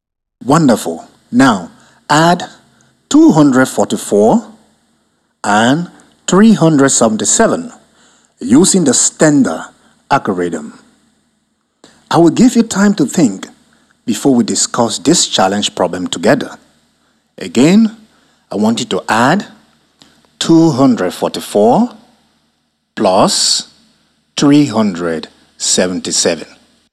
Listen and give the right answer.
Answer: The answer is 621.